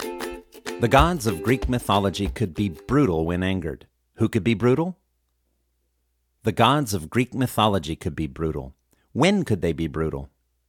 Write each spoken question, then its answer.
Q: When could they be brutal?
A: They could be brutal when angered.